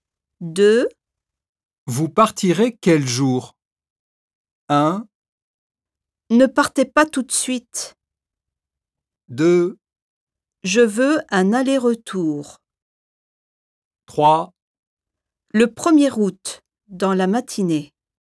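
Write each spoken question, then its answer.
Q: Vous partirez quel jour?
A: 3: Le 1er août, dans la matinée.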